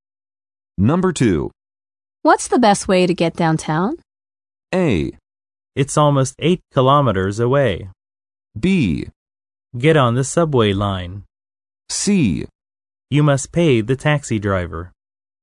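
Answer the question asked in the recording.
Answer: B: Get on the subway line.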